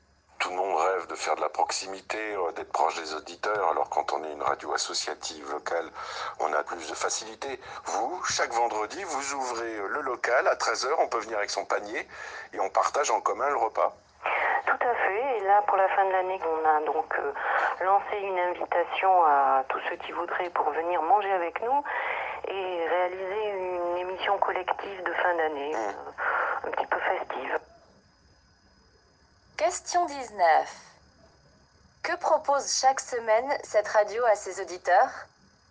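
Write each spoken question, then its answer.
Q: Que propose chaque semaine cette radio à ses auditeurs?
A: De venir au local chaque vendredi à 13h, avec leur panier, pour partager un repas en commun.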